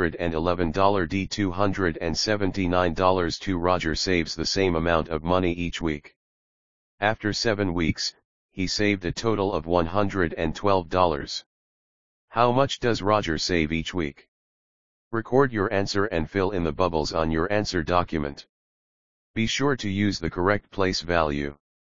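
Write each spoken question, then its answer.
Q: How much does Roger save each week?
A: $16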